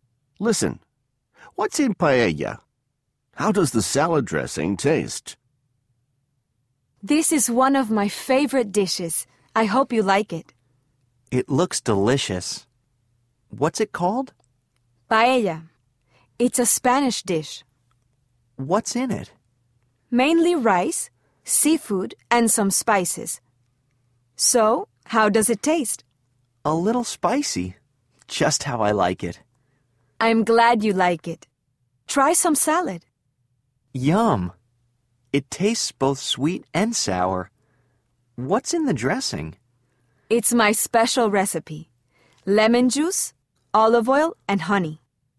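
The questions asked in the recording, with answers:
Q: What's in paella?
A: Mainly rice, seafood, and some spices

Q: How does the salad dressing taste?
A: Both sweet and sour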